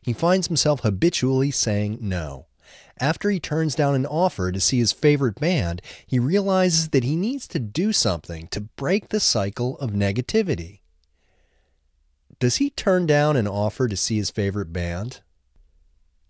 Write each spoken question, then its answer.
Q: Does he turn down an offer to see his favorite band?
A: Yes, he turns down an offer to see his favorite band.